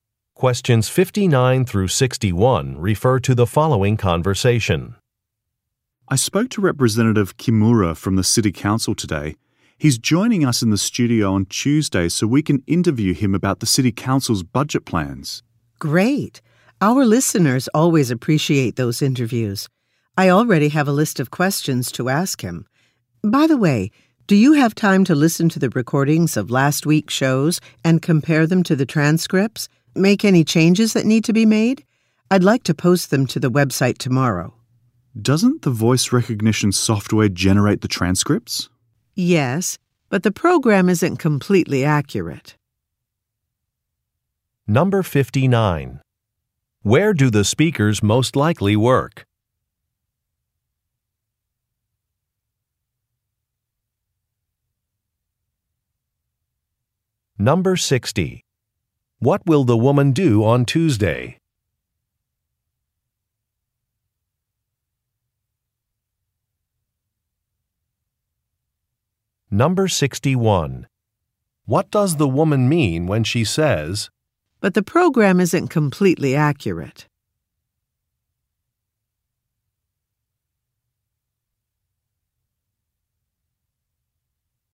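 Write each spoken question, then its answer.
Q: Where do the speakers most likely work?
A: At a radio station

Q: What does the woman mean when she says,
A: The transcripts need to be checked and corrected by a person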